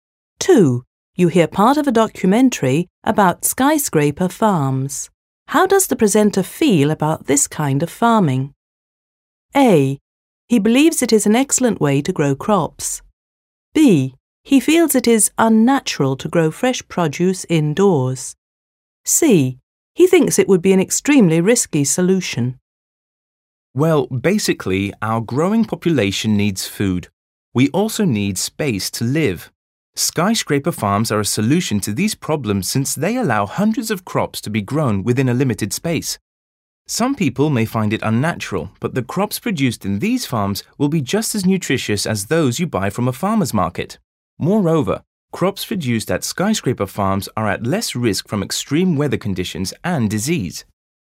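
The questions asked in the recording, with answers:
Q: How does the presenter feel about this kind of farming?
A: A: He believes it is an excellent way to grow crops.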